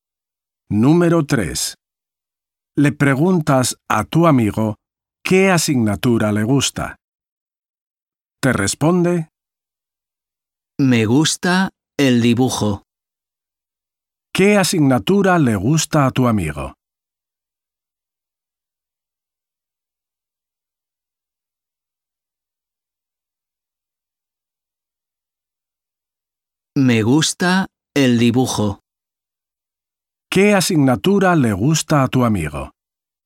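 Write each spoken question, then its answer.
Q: ¿Qué asignatura le gusta a tu amigo?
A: el dibujo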